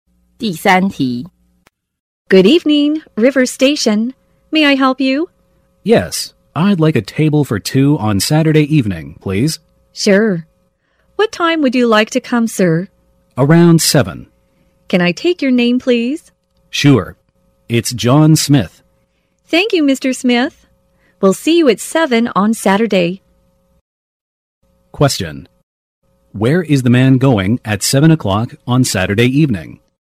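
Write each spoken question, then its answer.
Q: Where is the man going at 7 o'clock on Saturday evening?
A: To a restaurant (River Station)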